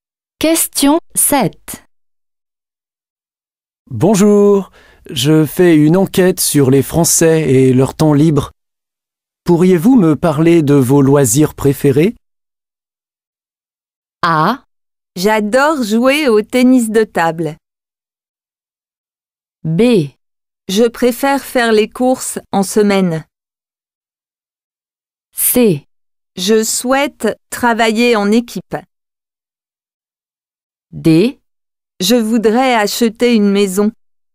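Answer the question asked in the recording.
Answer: A: J'adore jouer au tennis de table.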